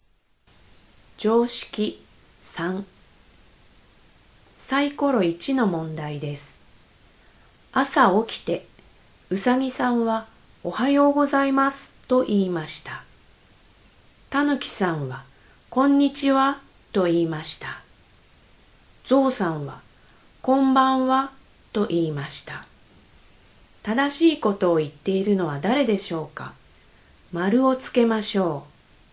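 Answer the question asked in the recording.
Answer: うさぎさん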